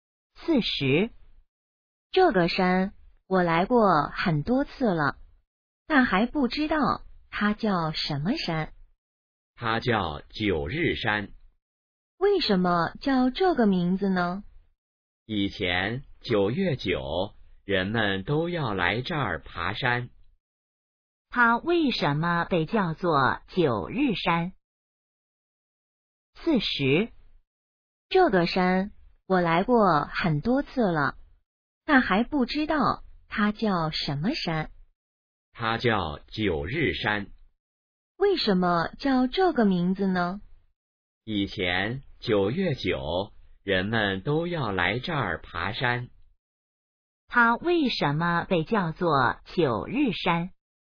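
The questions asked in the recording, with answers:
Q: 它为什么被叫做九日山?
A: 以前9月9日人们都来这儿爬山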